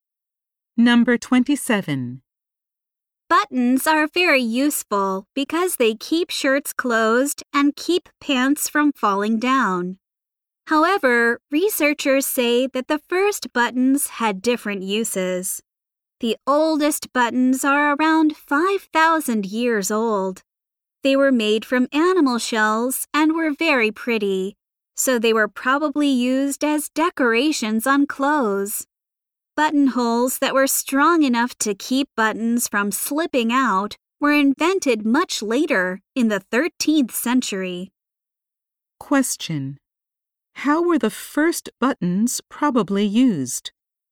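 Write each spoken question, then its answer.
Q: How were the first buttons probably used?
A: As decorations on clothes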